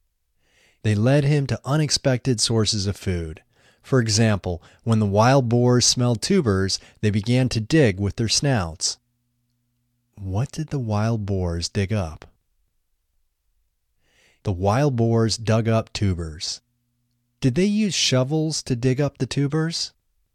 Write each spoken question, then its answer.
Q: Did they use shovels to dig up the tubers?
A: No, they didn't use shovels to dig up the tubers.